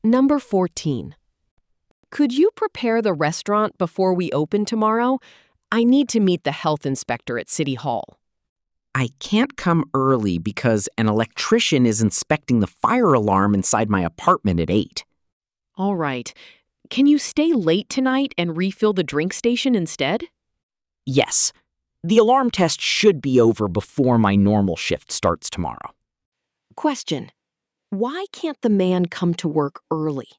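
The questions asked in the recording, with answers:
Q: Why can't the man come to work early?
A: An electrician is inspecting the fire alarm in his apartment at 8.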